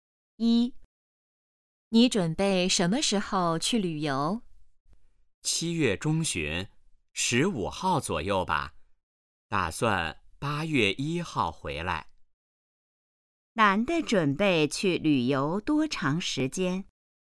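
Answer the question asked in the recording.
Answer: 半个月左右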